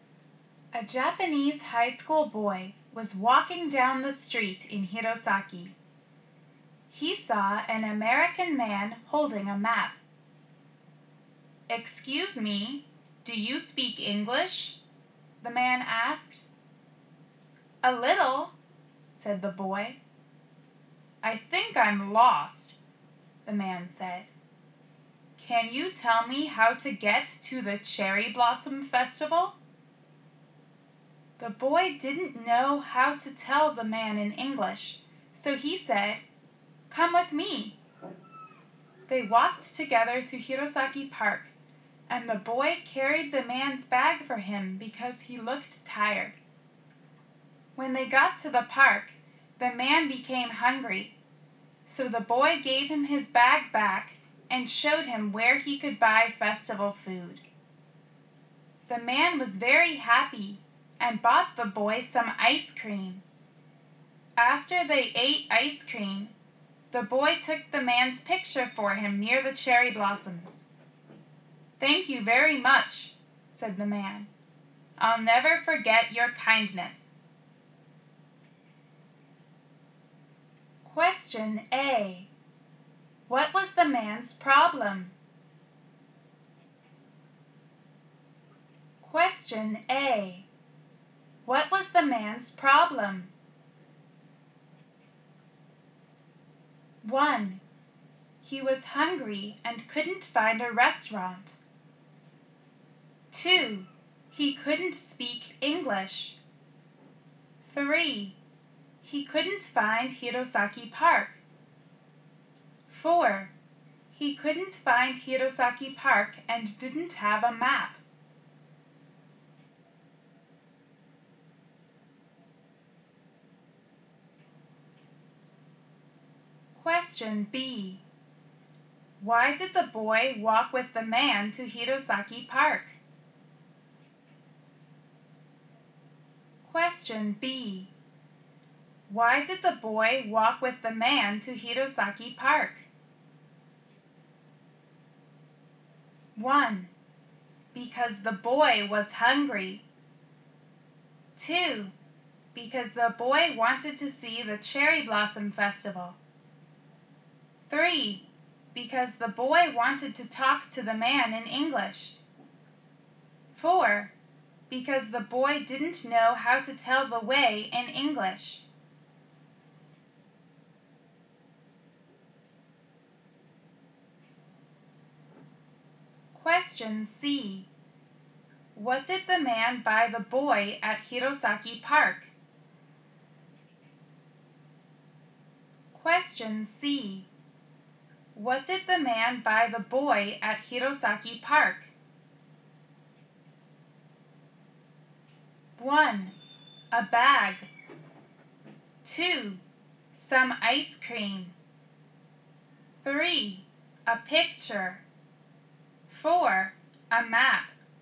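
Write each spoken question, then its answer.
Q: What was the man's problem?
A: 3: He couldn't find Hirosaki Park.

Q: Why did the boy walk with the man to Hirosaki Park?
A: 4: Because the boy didn't know how to tell the way in English.

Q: What did the man buy the boy at Hirosaki Park?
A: 2: Some ice cream.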